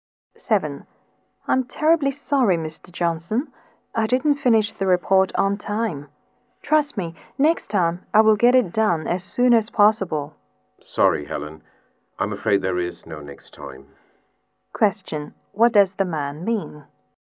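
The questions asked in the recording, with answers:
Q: What does the man mean?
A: Helen is fired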